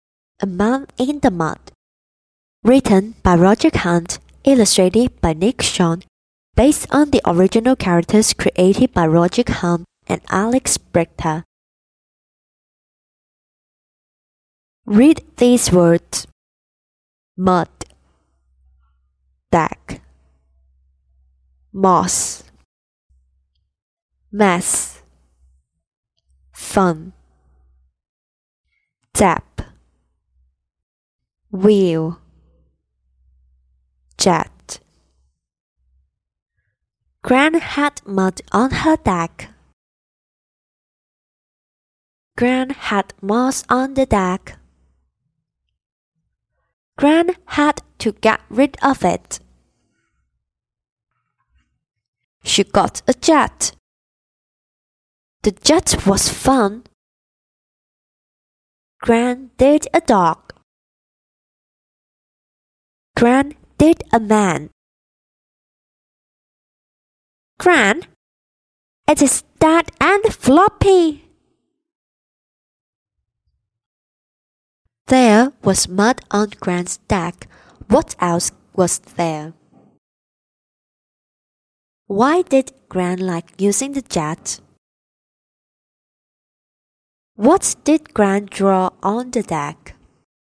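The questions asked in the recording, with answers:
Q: What else was there?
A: Moss

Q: Why did Gran like using the jet?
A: The jet was fun

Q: What did Gran draw on the deck?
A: A dog and a man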